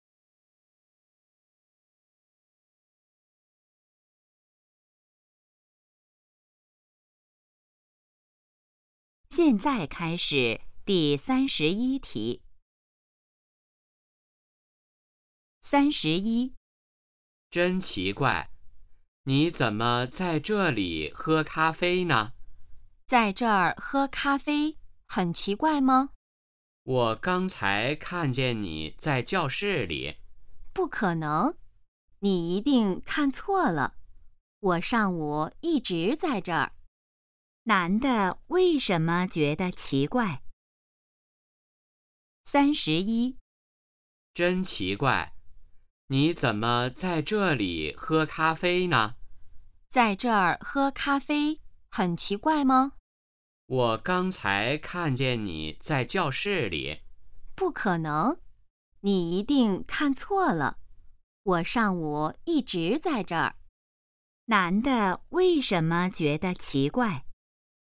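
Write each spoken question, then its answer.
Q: 男的为什么觉得奇怪?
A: 他刚才好像看见女的在教室里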